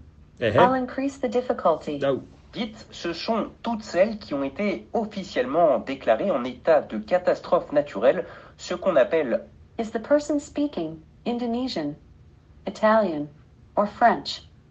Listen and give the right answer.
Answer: French.